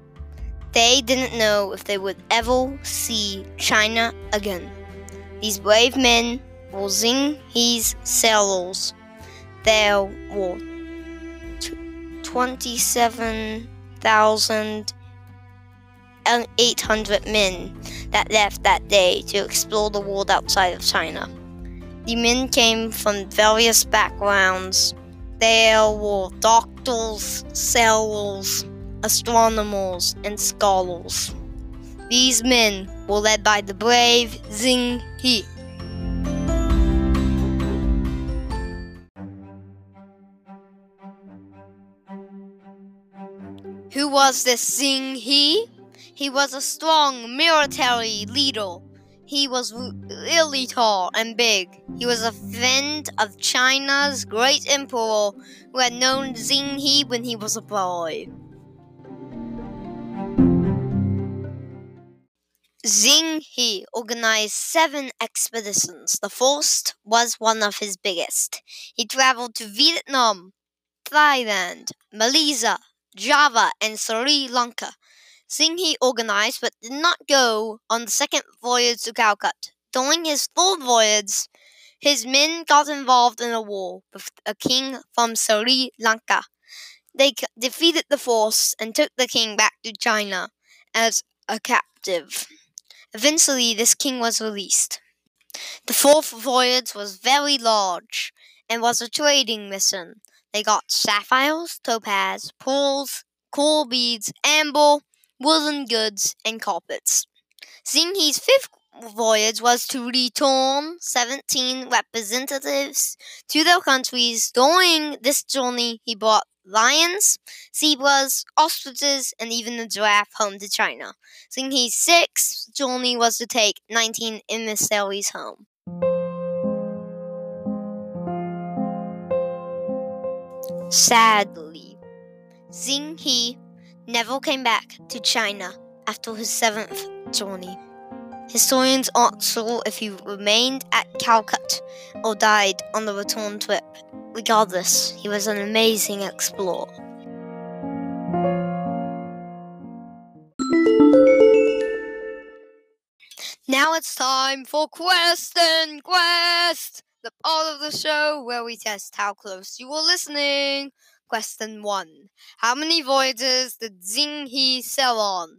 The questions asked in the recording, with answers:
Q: How many voyages did Xing He sail on?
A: Did you choose B? If so, you got it.